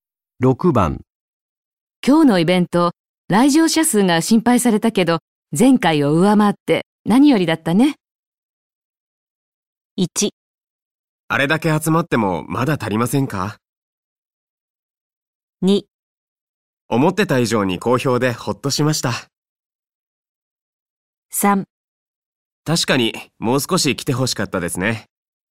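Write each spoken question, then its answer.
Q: 今日のイベント、来場者数が心配されたけど、前回を上回って何よりだったね。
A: 2: 思ってた以上に好評でほっとしました。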